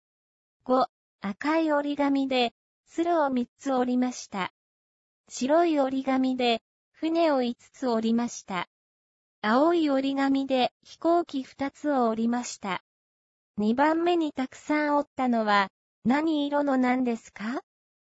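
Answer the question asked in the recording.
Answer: 赤い鶴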